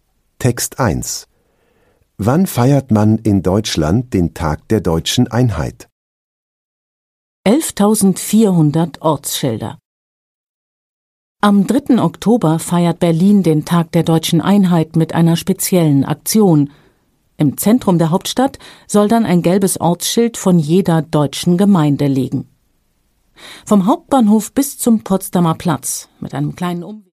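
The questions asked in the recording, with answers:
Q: Wann feiert man in Deutschland den Tag der Deutschen Einheit?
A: Am 3. Oktober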